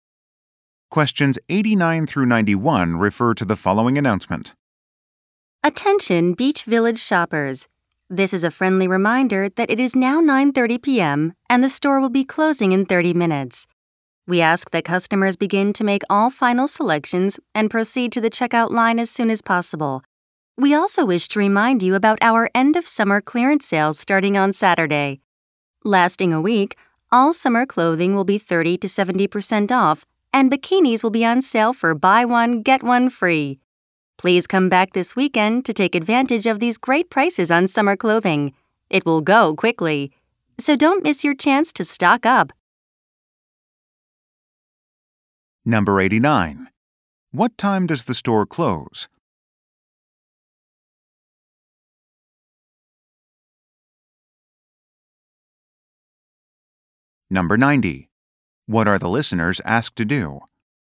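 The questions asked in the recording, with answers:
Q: What time does the store close?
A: 10 p.m.

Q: What are the listeners asked to do?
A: Make final selections and go to the checkout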